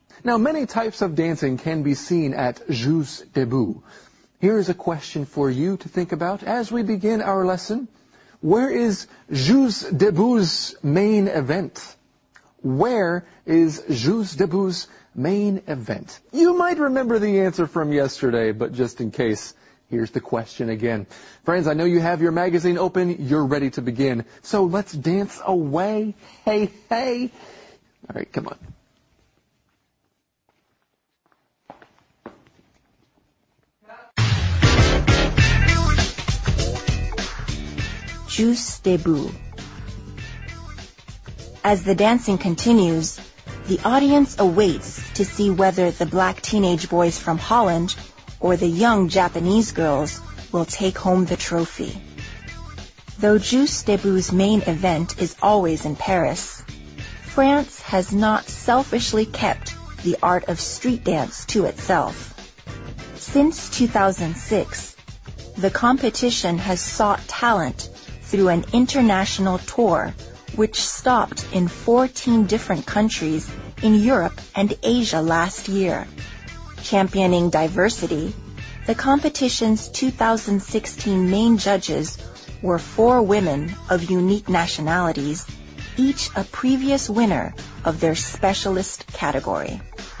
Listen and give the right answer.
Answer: It's in Paris.